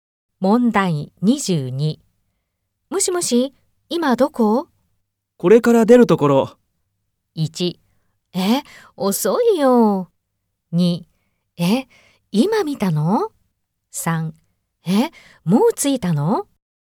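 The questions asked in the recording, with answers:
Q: もしもし、今どこ?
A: 2: え、遅いよ。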